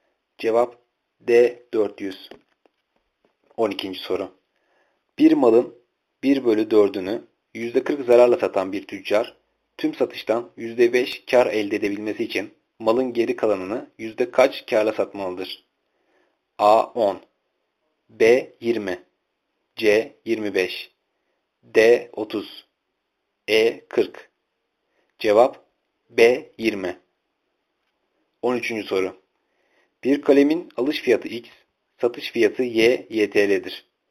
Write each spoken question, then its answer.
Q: Bir malın 1 bölü 4'ünü %40 zararla satan bir tüccar, tüm satıştan %5 kar elde edebilmesi için malın geri kalanını yüzde kaç karla satmalıdır?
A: Cevap B 20.